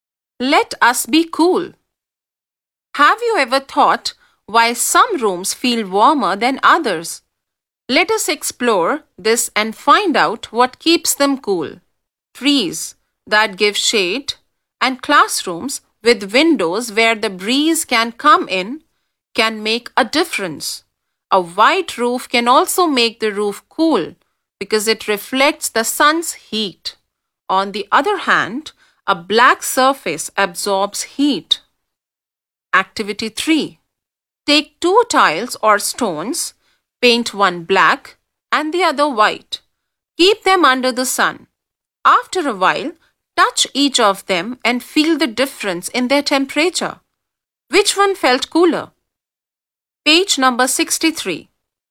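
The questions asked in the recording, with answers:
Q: Which one felt cooler?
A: The white one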